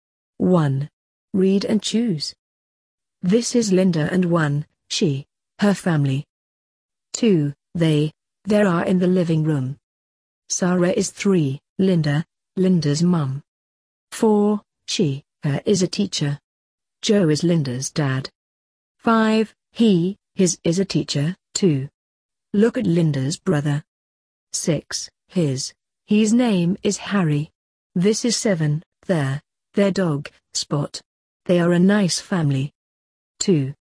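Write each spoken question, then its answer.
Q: This is Linda and 1, she, her family.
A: her

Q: 2, they, there are in the living room.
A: they

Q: Sarah is 3, Linda, Linda's mum.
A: Linda's

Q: 4, she, her is a teacher.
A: she

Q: 5, he, his is a teacher, too.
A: he

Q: 6, his, he's name is Harry.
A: his

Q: This is 7, there, their dog, Spot.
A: their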